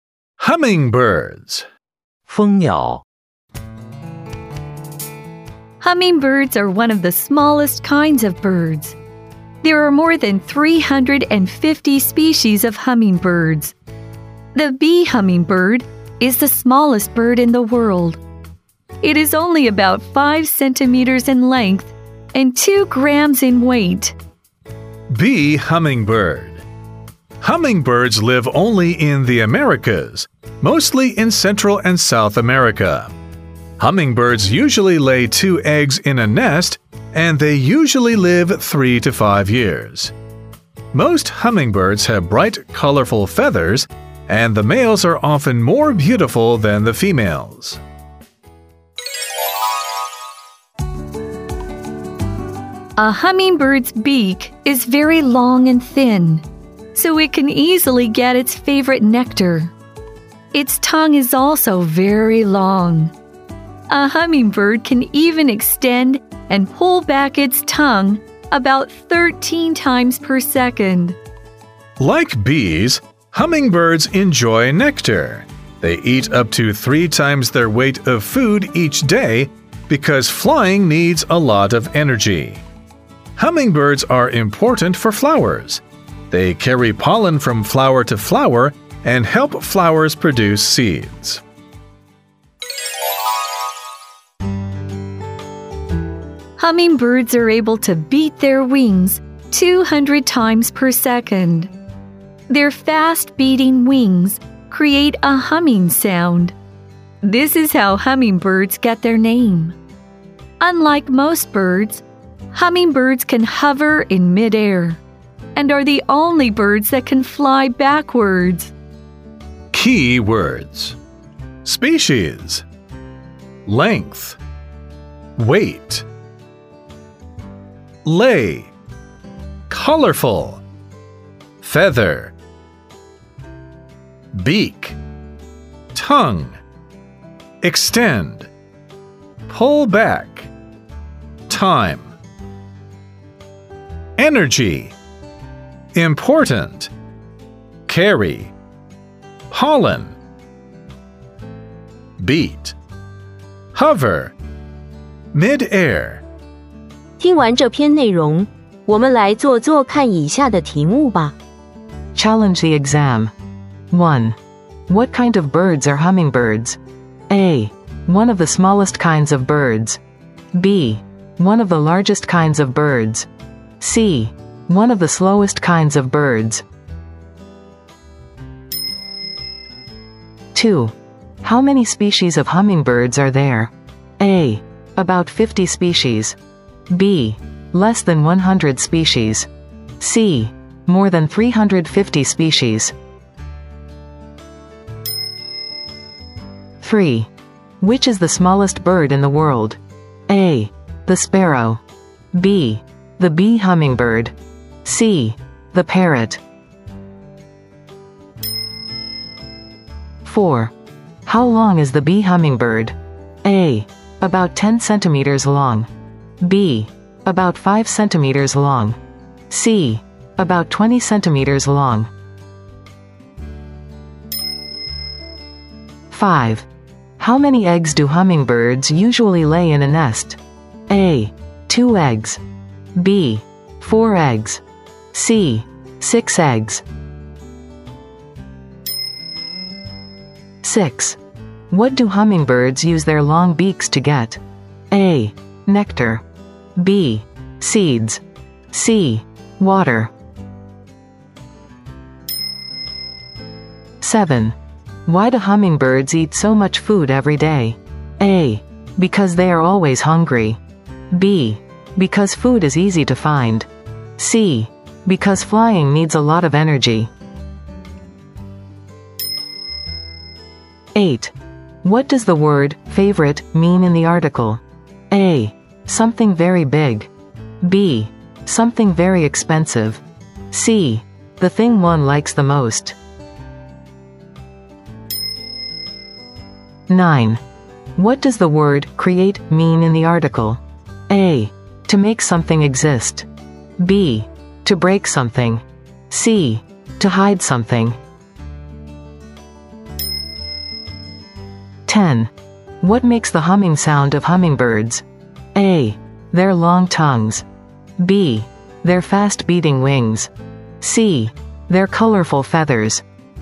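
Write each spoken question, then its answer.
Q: What kind of birds are hummingbirds?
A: A: One of the smallest kinds of birds.

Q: How many species of hummingbirds are there?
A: C: More than 350 species.

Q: Which is the smallest bird in the world?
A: B: The bee hummingbird.

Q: How long is the bee hummingbird?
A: B: About 5 centimeters long.

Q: How many eggs do hummingbirds usually lay in a nest?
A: A: 2 eggs.

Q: What do hummingbirds use their long beaks to get?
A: A: Nectar.

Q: Why do hummingbirds eat so much food every day?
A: C: Because flying needs a lot of energy.

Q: What does the word favorite mean in the article?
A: C: The thing one likes the most.

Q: What does the word create mean in the article?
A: A: To make something exist.

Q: What makes the humming sound of hummingbirds?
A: B: Their fast beating wings.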